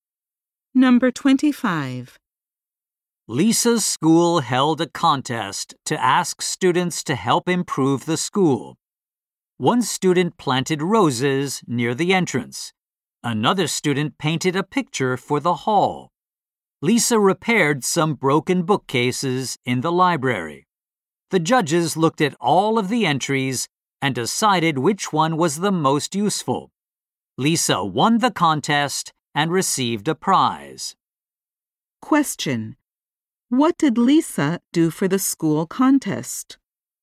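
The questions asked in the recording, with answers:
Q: What did Lisa do for the school contest?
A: She repaired some broken bookcases in the library.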